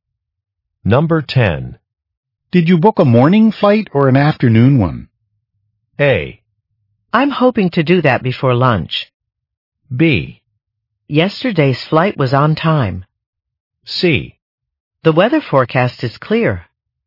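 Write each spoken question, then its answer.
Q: Did you book a morning flight or an afternoon one?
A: A: I'm hoping to do that before lunch.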